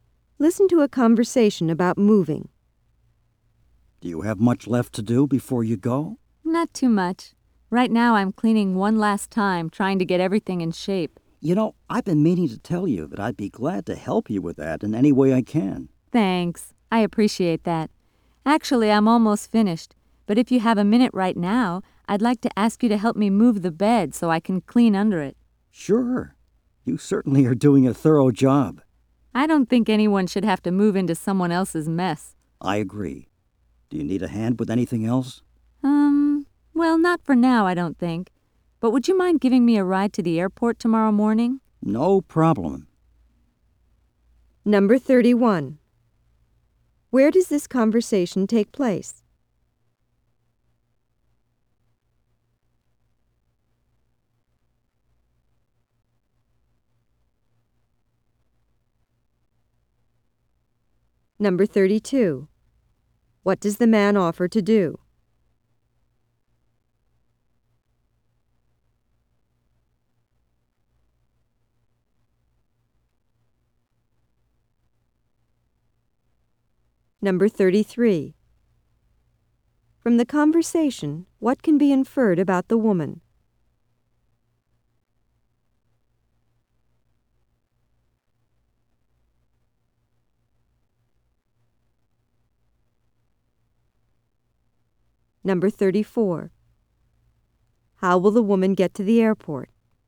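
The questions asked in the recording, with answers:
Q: What does the man offer to do?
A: Help her with the cleaning and moving out

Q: How will the woman get to the airport?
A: The man will drive her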